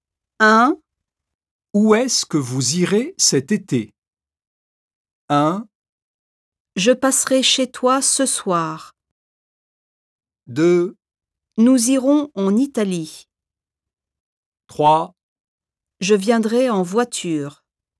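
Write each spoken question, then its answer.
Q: Où est-ce que vous irez cet été?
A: 2: Nous irons en Italie.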